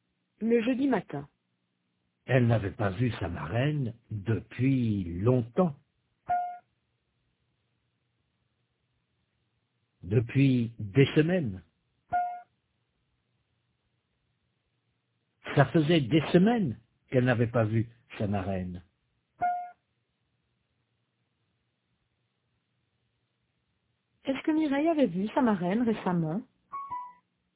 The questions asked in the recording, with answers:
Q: Est-ce que Mireille avait vu sa marraine récemment?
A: Non, ça faisait des semaines qu'elle ne l'avait pas vue.